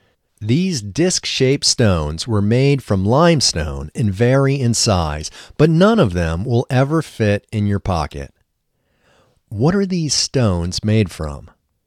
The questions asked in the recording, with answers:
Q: What are these stones made from?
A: These stones are made from limestone.